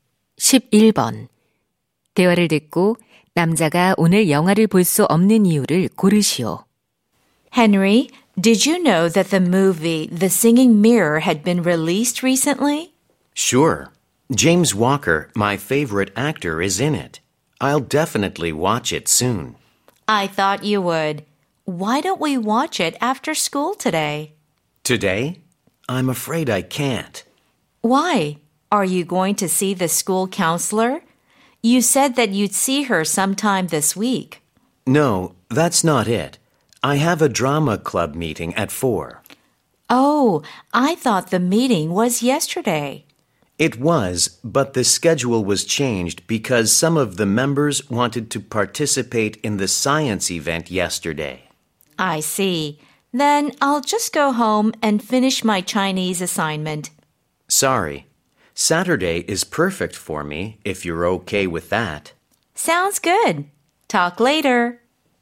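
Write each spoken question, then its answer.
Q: 대화를 듣고 남자가 오늘 영화를 볼 수 없는 이유를 고르시오.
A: 연극 동아리 모임이 있어서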